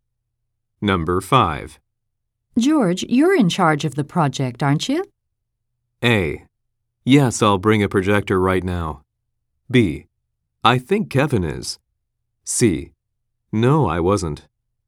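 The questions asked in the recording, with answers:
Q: George, you're in charge of the project, aren't you?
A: B: I think Kevin is.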